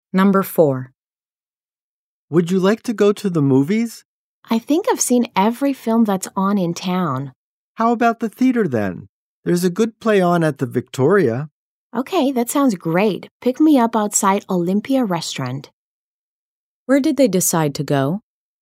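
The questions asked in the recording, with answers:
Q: Where did they decide to go?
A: To the theater (a play at the Victoria)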